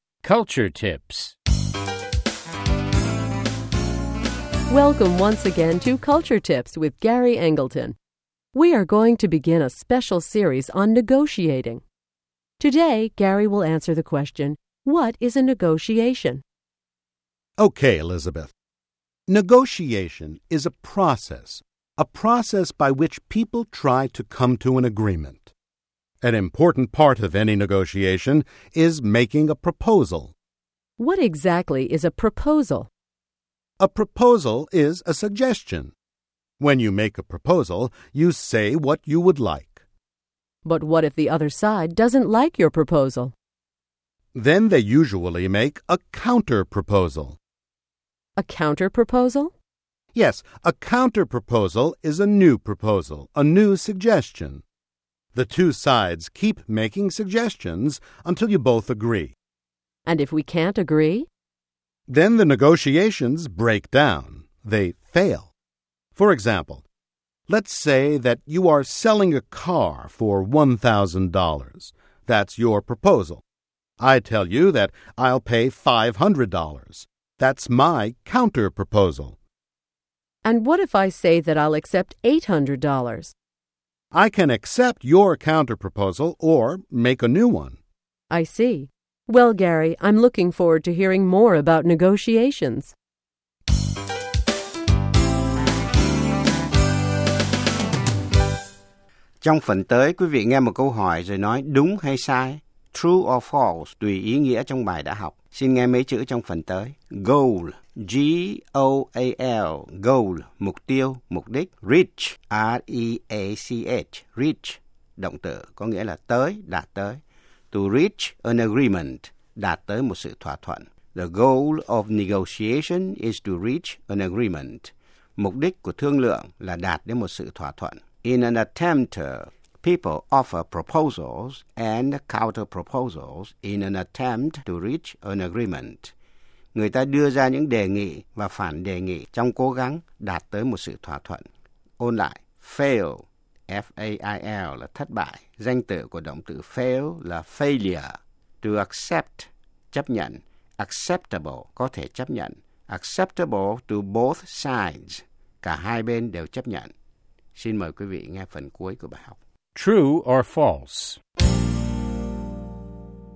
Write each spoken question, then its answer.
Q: The goal of negotiation is to reach an agreement.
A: True. People offer proposals and counter-proposals in an attempt to reach an agreement.